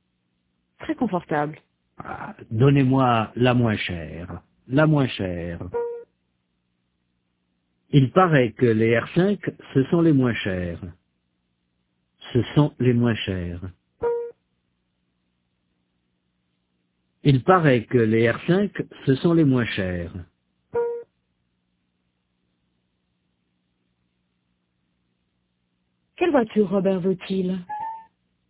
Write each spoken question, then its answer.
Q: Quelle voiture Robert veut-il?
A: La moins chère.